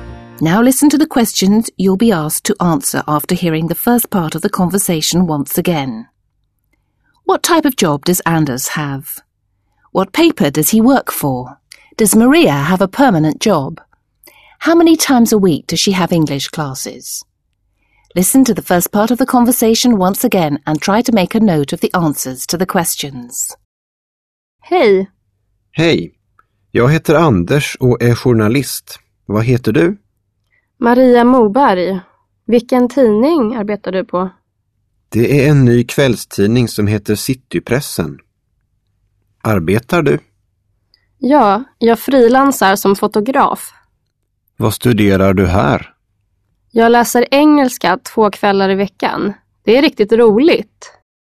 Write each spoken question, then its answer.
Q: What type of job does Anders have?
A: Anders is a journalist.

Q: What paper does he work for?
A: The paper Anders works for is a new evening paper called Citypressen.

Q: Does Maria have a permanent job?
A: Maria doesn't have a permanent job.

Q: How many times a week does she have English classes?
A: Twice a week.